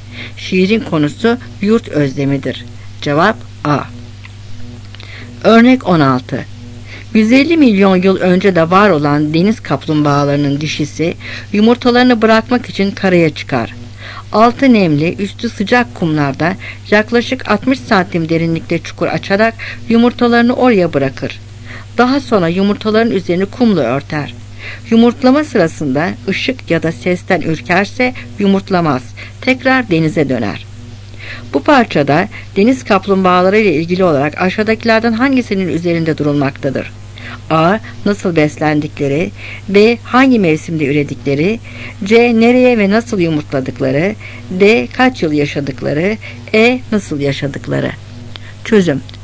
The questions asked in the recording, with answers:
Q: Bu parçada deniz kaplumbağaları ile ilgili olarak aşağıdakilerden hangisinin üzerinde durulmaktadır?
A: Cevap C.